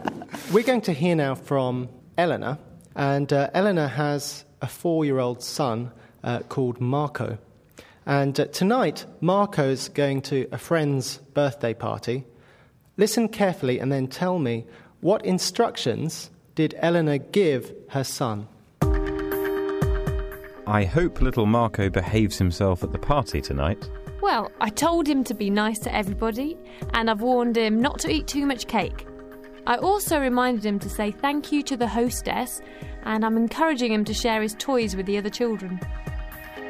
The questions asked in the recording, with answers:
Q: what instructions did Eleanor give her son?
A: Eleanor told Marco to be nice to everybody.